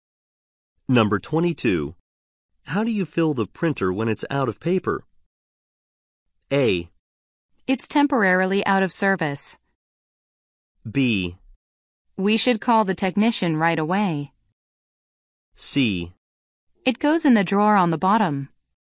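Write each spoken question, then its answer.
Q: How do you fill the printer when it's out of paper?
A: C: It goes in the drawer on the bottom.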